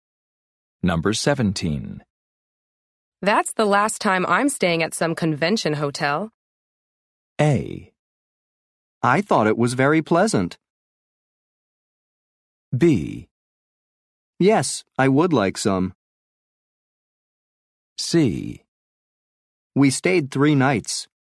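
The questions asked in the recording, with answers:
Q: That's the last time I'm staying at some convention hotel.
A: A: I thought it was very pleasant.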